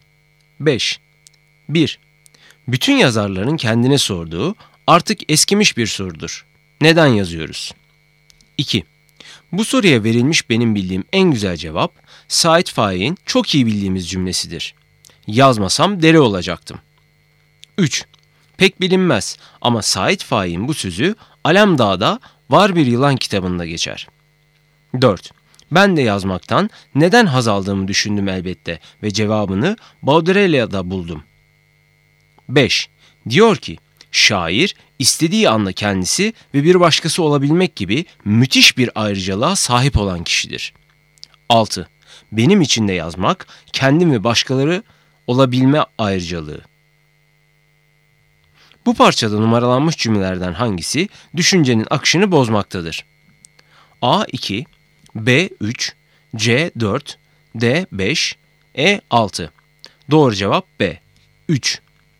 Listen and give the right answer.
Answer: Doğru cevap B 3.